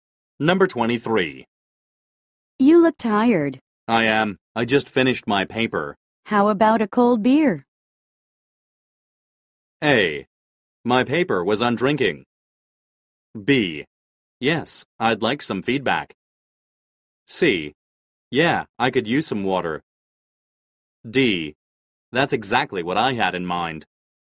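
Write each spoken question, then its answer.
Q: How about a cold beer?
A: D: That's exactly what I had in mind.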